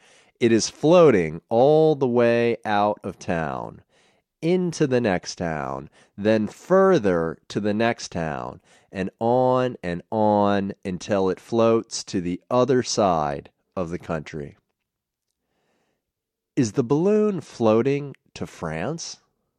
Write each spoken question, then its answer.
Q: Is the balloon floating to France?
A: No, the balloon isn't floating to France.